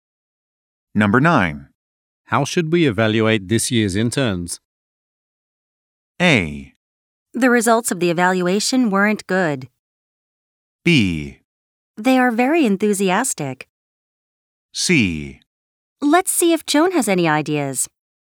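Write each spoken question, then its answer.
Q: How should we evaluate this year's interns?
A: C: Let's see if Joan has any ideas.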